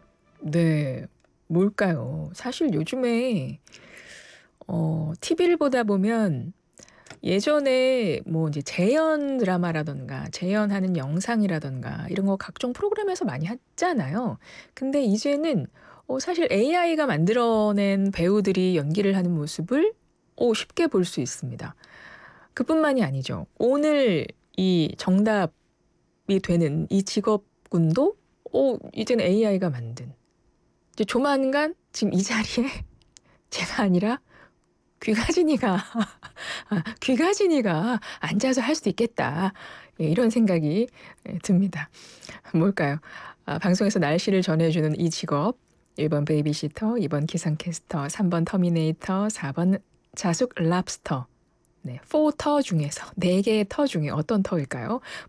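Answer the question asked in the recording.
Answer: 2: 기상캐스터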